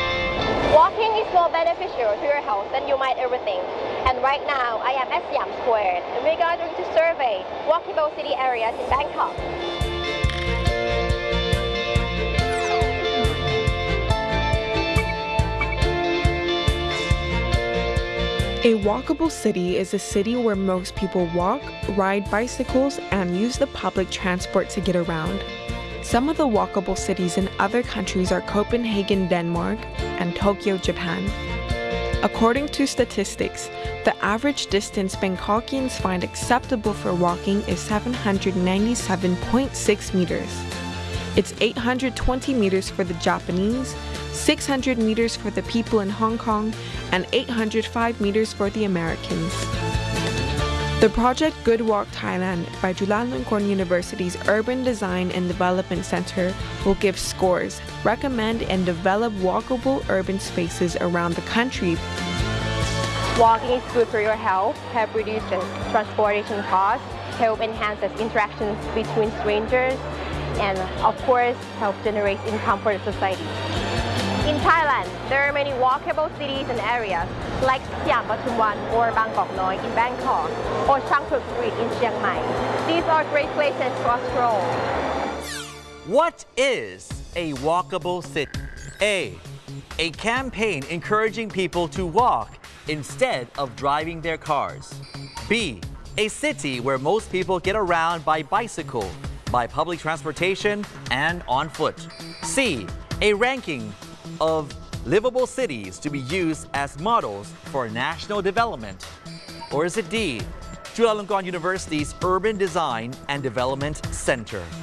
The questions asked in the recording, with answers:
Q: What is a walkable city?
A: B. The answer is B.